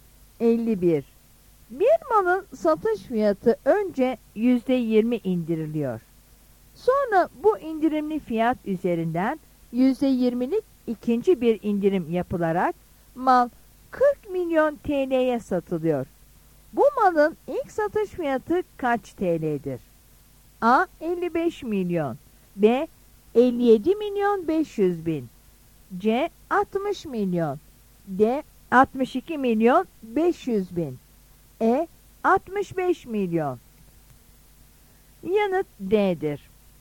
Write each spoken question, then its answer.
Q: Bu malın ilk satış fiyatı kaç TL'dir?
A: Yanıt D'dir.